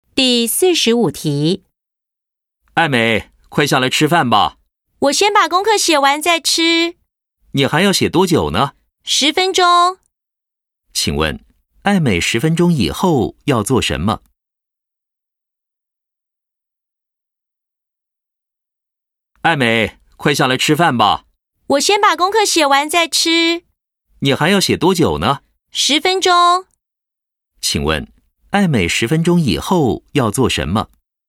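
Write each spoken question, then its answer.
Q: 请问,艾美十分钟以后要做什么?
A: 吃饭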